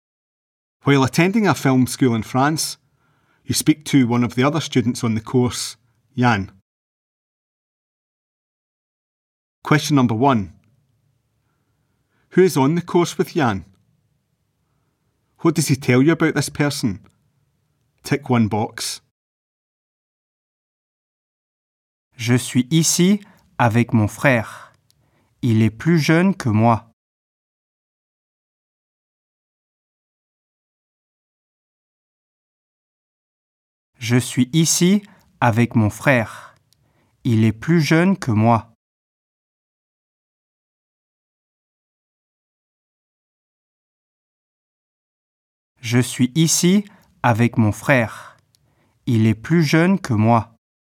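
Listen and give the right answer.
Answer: His brother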